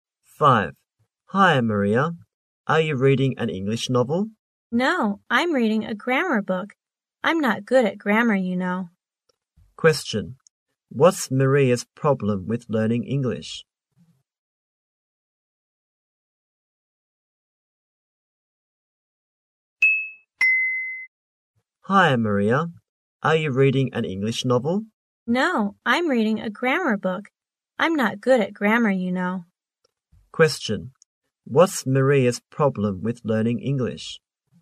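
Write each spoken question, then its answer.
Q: What's Maria's problem with learning English?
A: She's not good at grammar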